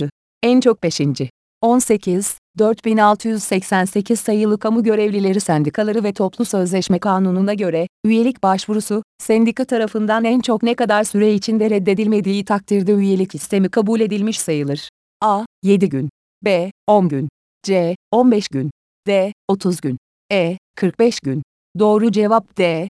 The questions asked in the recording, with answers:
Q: 4688 sayılı Kamu Görevlileri Sendikaları ve Toplu Sözleşme Kanunu'na göre, üyelik başvurusu, sendika tarafından en çok ne kadar süre içinde reddedilmediği takdirde üyelik istemi kabul edilmiş sayılır.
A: Doğru cevap D.